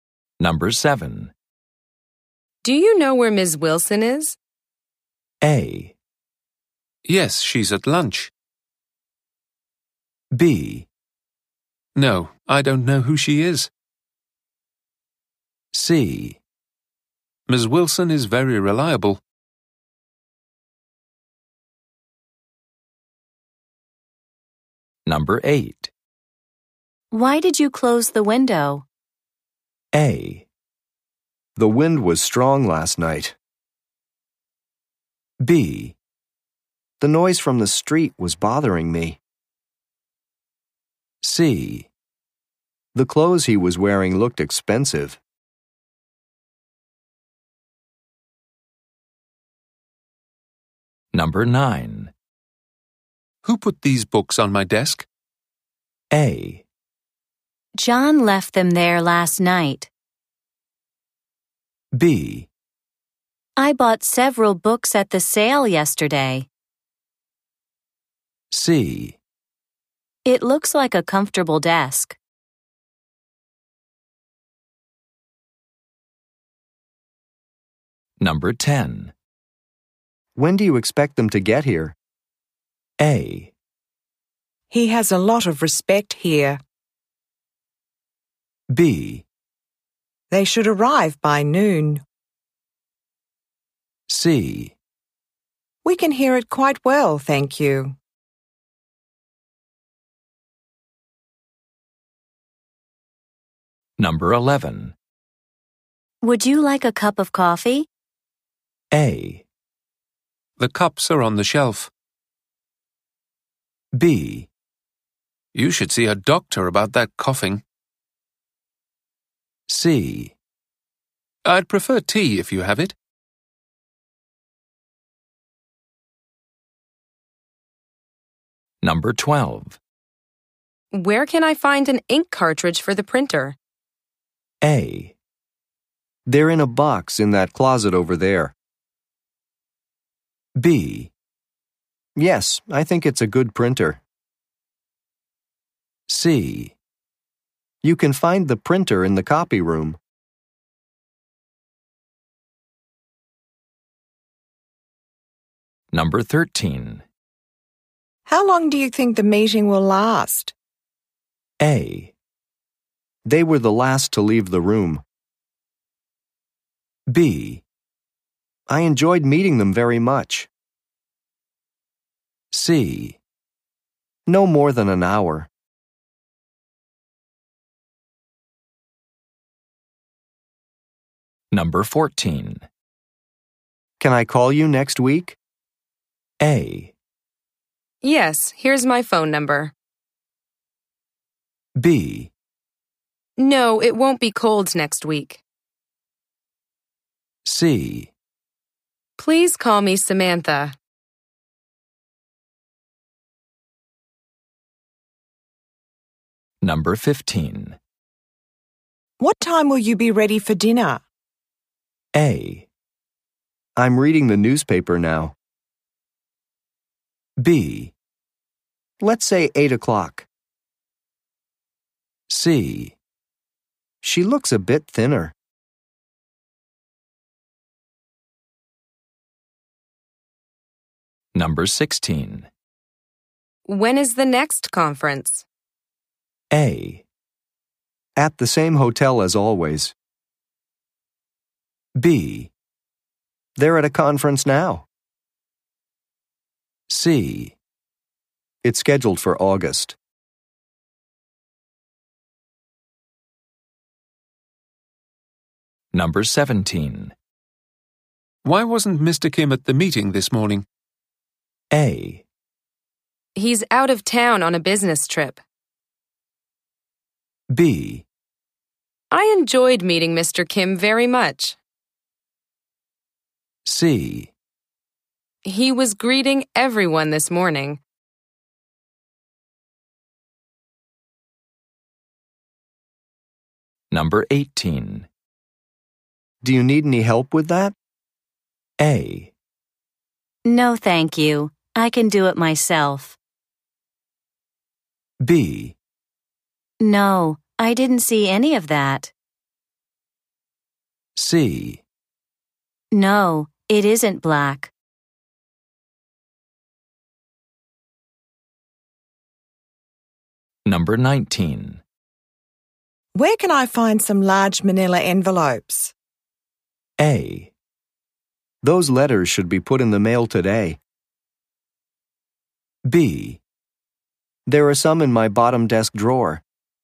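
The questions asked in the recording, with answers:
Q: Do you know where Ms. Wilson is?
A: A: Yes, she's at lunch.

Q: Why did you close the window?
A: B: The noise from the street was bothering me.

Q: Who put these books on my desk?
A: A: John left them there last night.

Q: When do you expect them to get here?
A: B: They should arrive by noon.

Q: Would you like a cup of coffee?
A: C: I'd prefer tea if you have it.

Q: Where can I find an ink cartridge for the printer?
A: A: They're in a box in that closet over there.

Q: How long do you think the meeting will last?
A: C: No more than an hour.

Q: Can I call you next week?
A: A: Yes, here's my phone number.

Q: What time will you be ready for dinner?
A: B: Let's say 8 o'clock.

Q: When is the next conference?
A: C: It's scheduled for August.

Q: Kim at the meeting this morning?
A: A: He's out of town on a business trip.

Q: Do you need any help with that?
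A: A: No, thank you. I can do it myself.

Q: Where can I find some large manila envelopes?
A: B: There are some in my bottom desk drawer.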